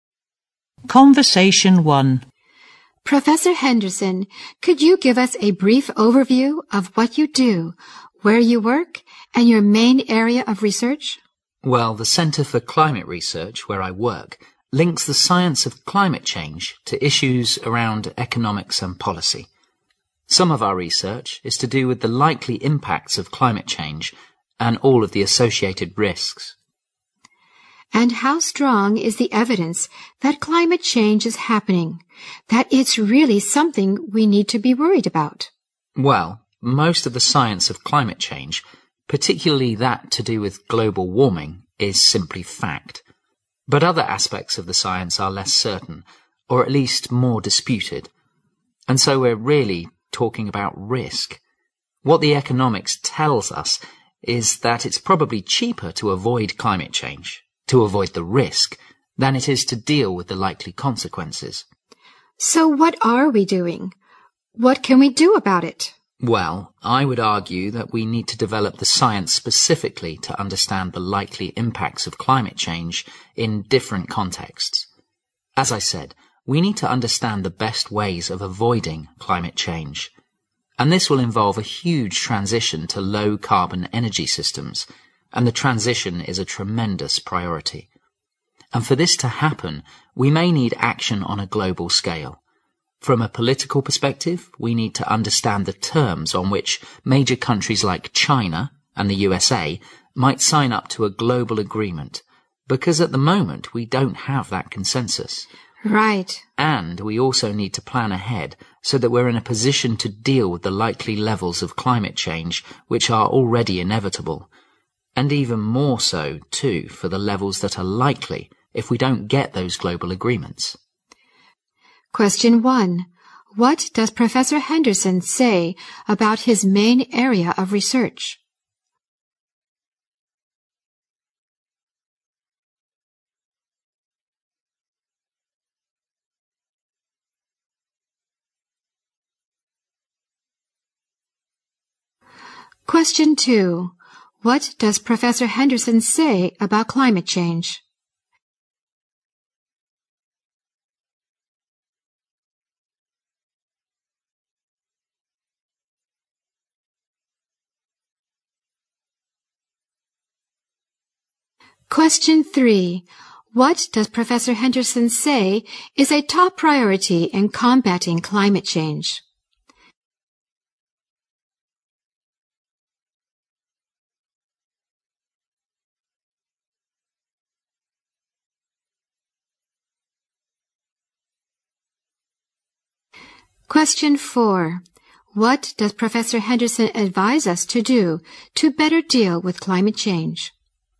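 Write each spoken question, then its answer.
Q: What does Professor Henderson say about his main area of research?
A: It links the science of climate change to economics and policy.

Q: What does Professor Henderson say is a top priority in combating climate change?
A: A transition to low-carbon energy systems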